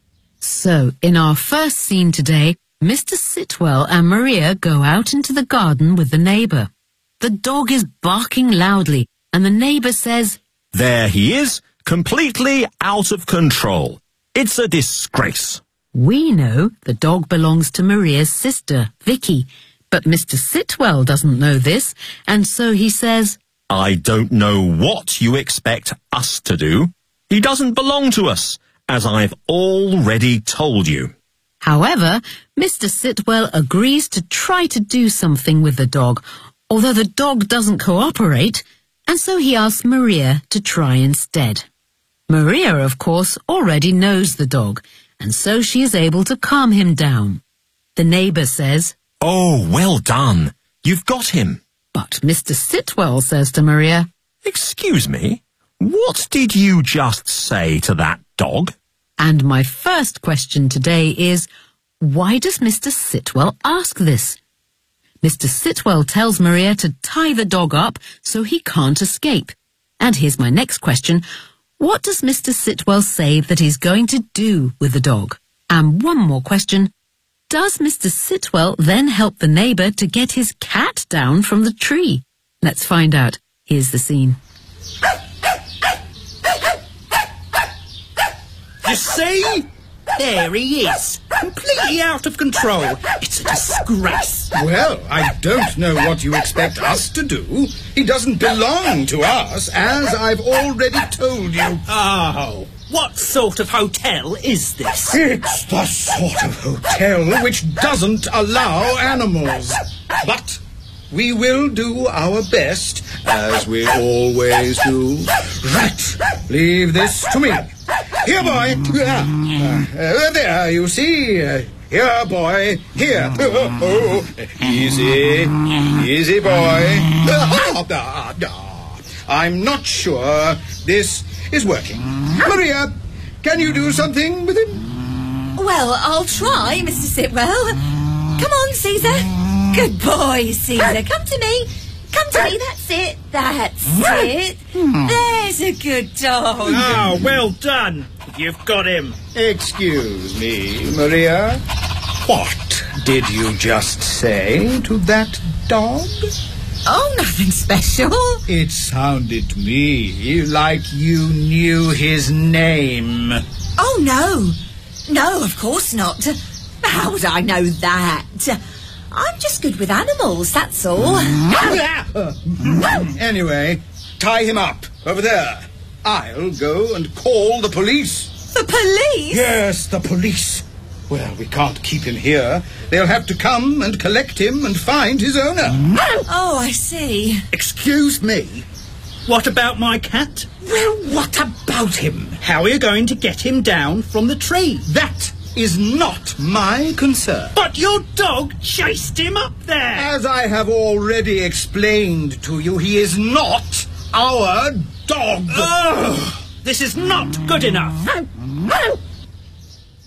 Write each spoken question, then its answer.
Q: why does Mr. Sitwell ask this?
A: It sounded to me like you knew his name.

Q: What does Mr. Sitwell say that he's going to do with the dog?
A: I'll go and call the police.

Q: Does Mr. Sitwell then help the neighbour to get his cat down from the tree?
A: No. He says to him,